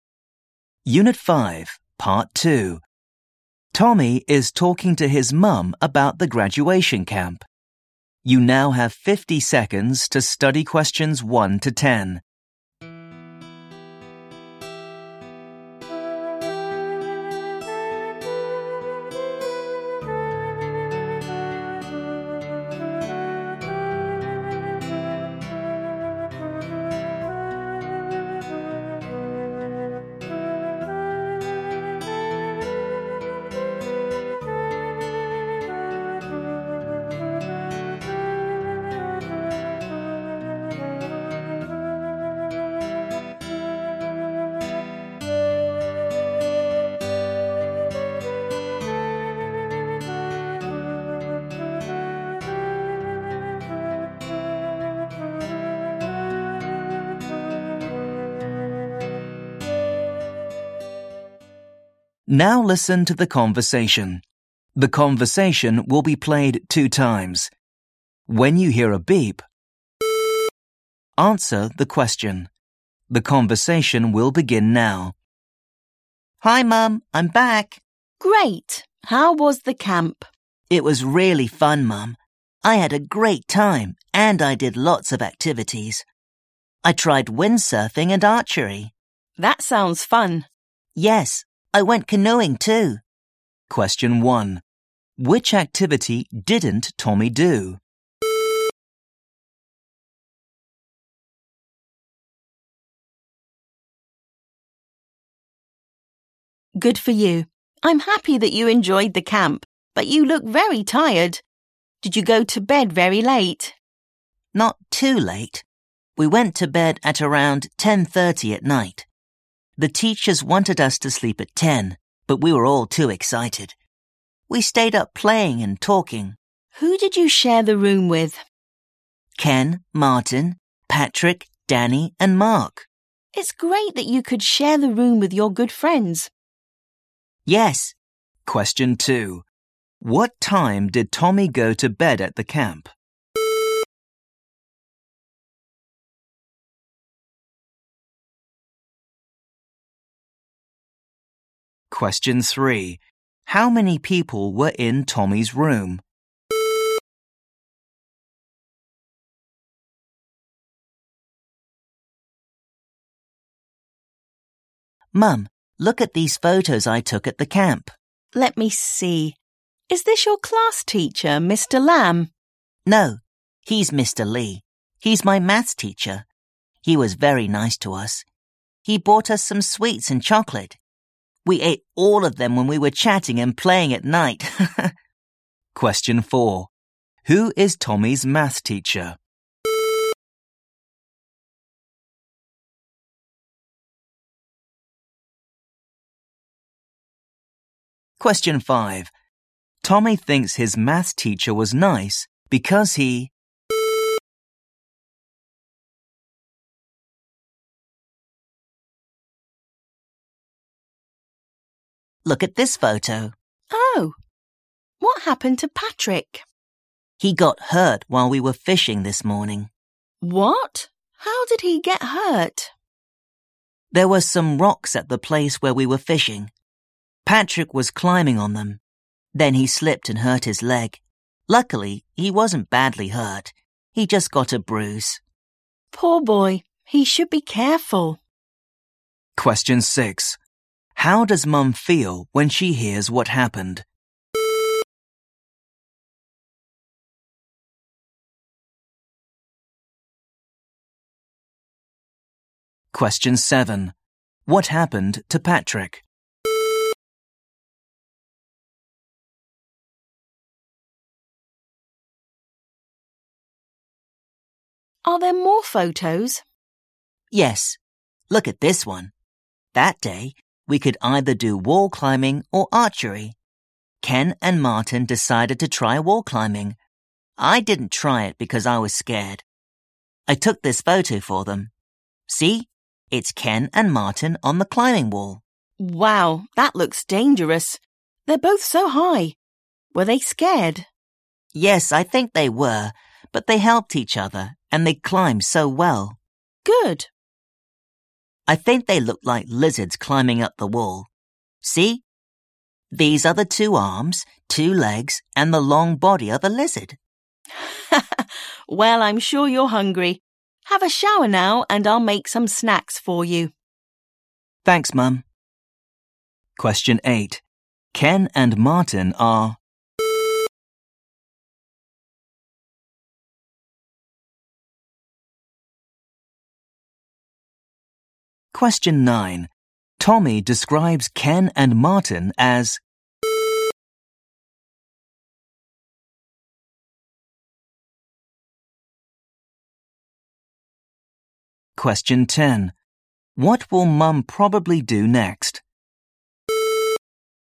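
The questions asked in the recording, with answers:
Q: What time did Tommy go to bed at the camp?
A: At around 10:30 at night

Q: How many people were in Tommy's room?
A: Six

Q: Who is Tommy's math teacher?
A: Mr. Lee

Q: What happened to Patrick?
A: He slipped on rocks while fishing and hurt his leg (got a bruise)

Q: What will Mum probably do next?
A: Make some snacks for Tommy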